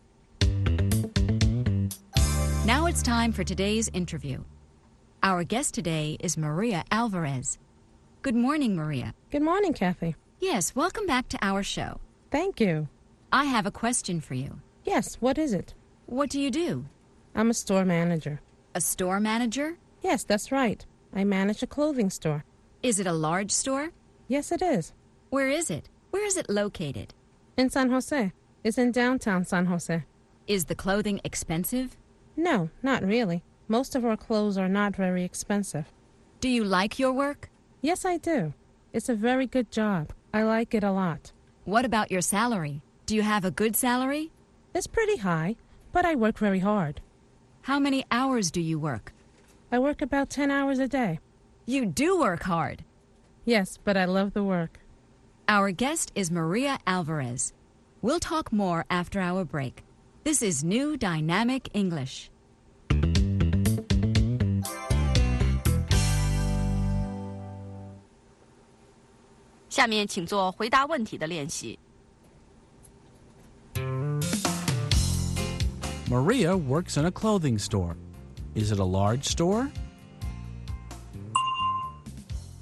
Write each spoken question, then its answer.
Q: Is it a large store?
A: Yes, it is. It's large. The store sells clothing.